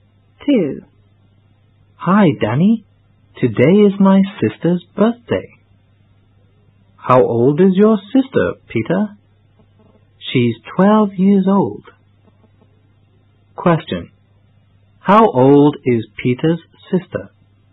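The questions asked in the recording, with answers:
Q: How old is Peter's sister?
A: 12 years old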